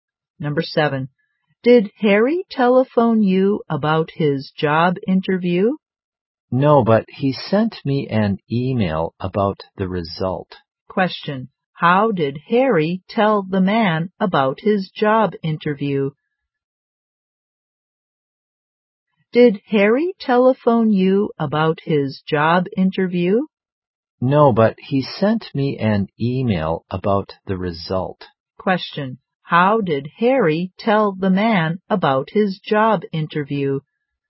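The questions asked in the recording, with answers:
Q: How did Harry tell the man about his job interview?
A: By email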